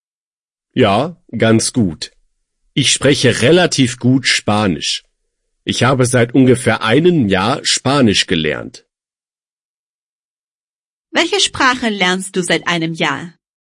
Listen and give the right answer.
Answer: Spanisch. Ich lerne seit einem Jahr Spanisch.